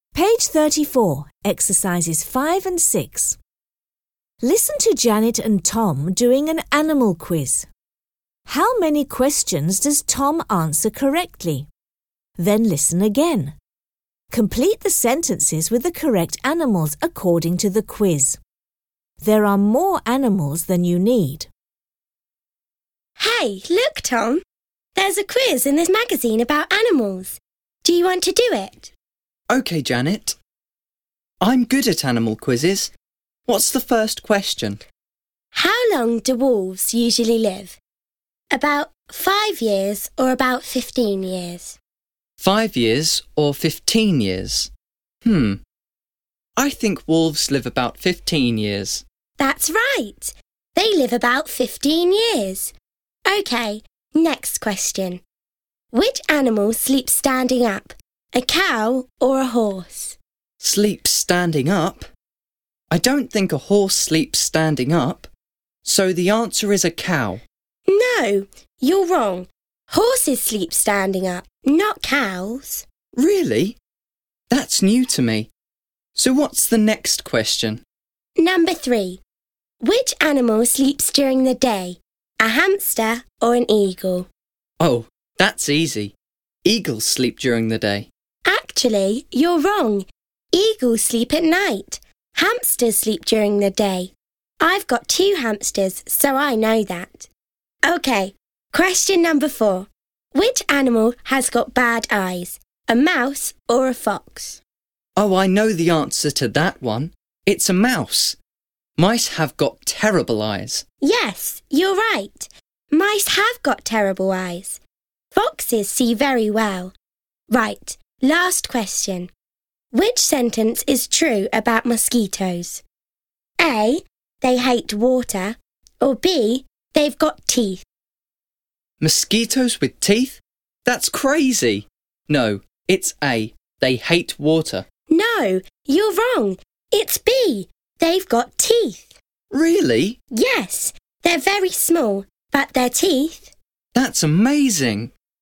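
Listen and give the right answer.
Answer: Two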